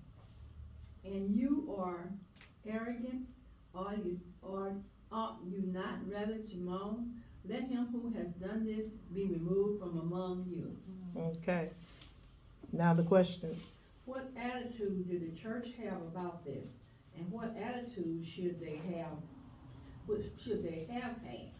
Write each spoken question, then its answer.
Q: What attitude did the church have about this?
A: They were arrogant.

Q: And what attitude should they have?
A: And they should have been mourning.